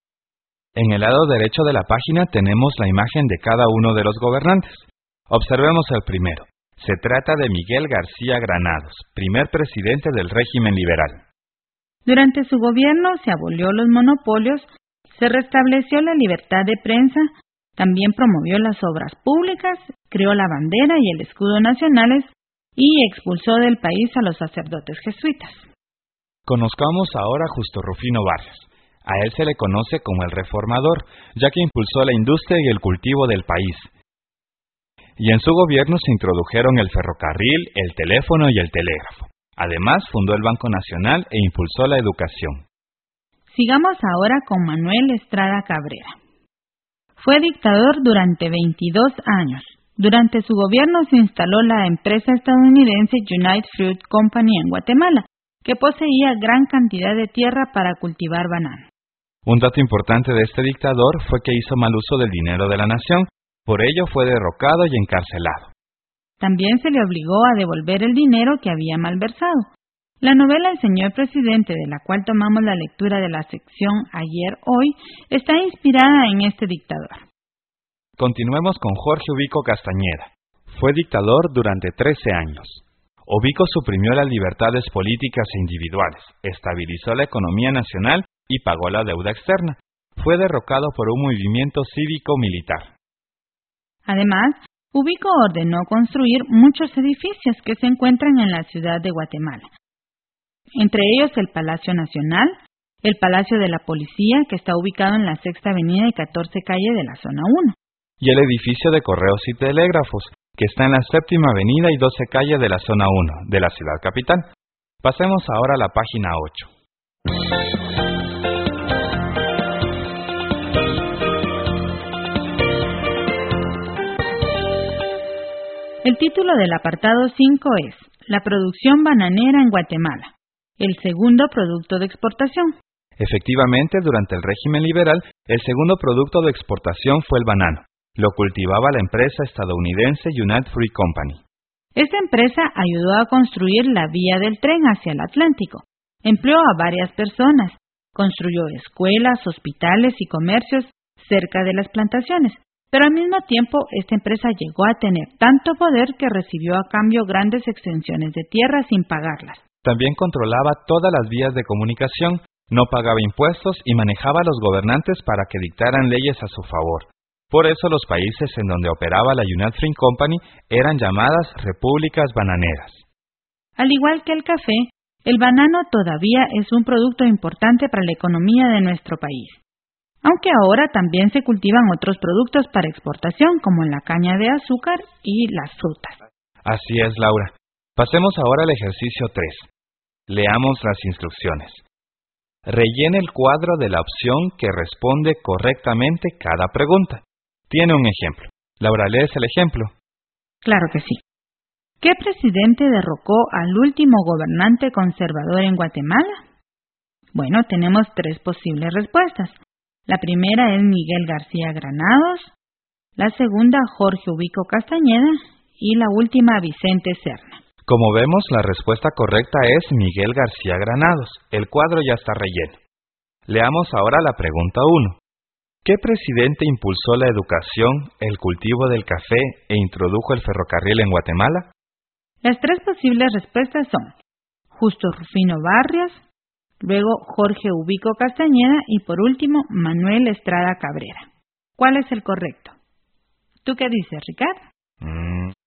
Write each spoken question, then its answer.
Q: ¿Qué presidente impulsó la educación, el cultivo del café e introdujo el ferrocarril en Guatemala?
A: Es Justo Rufino Barrios, a quien se le conoce como el reformador.